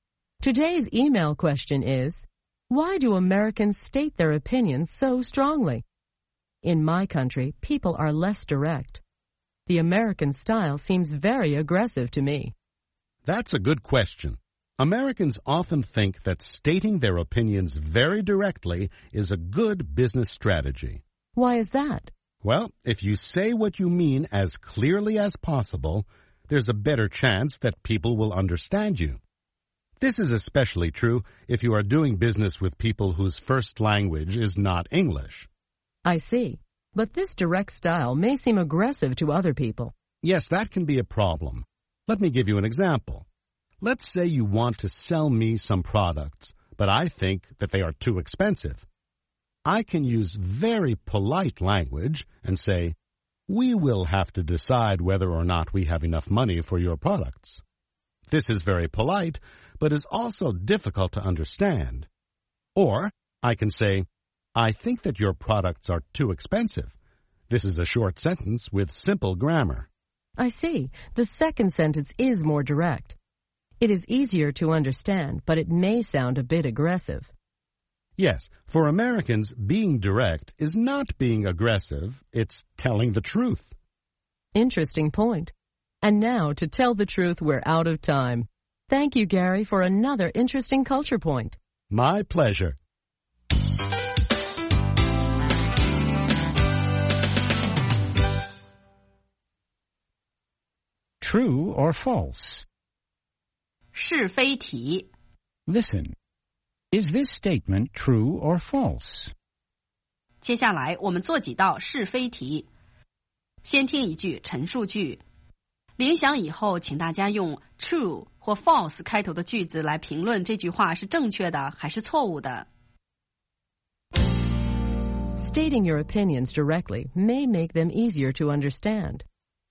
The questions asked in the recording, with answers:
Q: Stating your opinions directly may make them easier to understand.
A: True.Especially when the sentences are short and the grammar is simple.